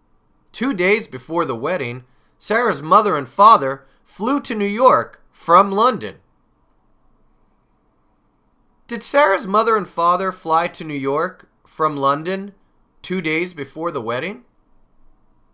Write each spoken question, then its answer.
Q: Did Sarah's mother and father fly to New York from London 2 days before the wedding?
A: Yes. Yes, they did. They flew to New York 2 days before the wedding.